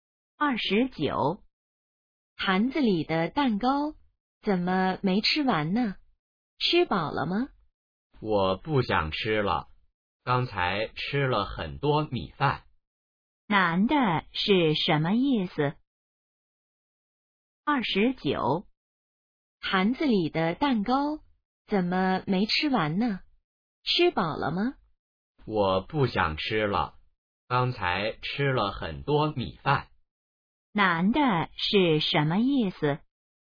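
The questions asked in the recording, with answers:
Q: 男的是什么意思?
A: 吃饱了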